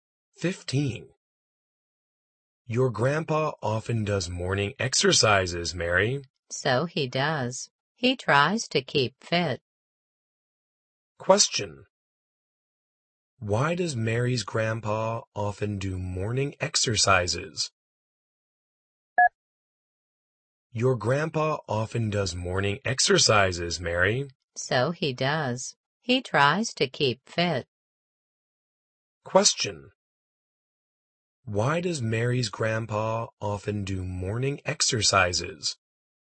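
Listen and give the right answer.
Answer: To keep fit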